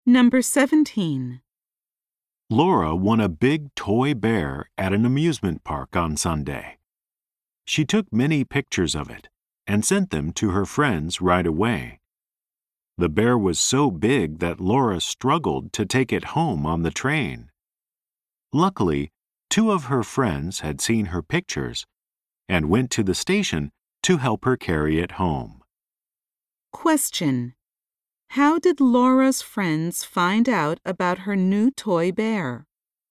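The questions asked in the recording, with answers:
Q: how did Laura's friends find out about her new toy bear?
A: They saw the pictures she sent them.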